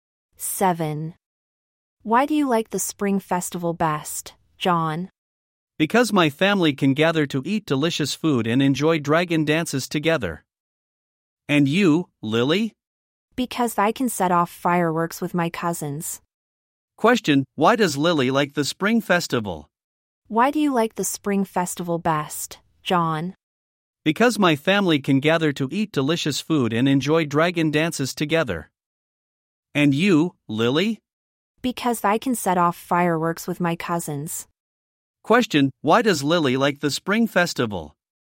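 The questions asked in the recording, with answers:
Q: Question, why does Lily like the spring festival?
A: Because she can set off fireworks with her cousins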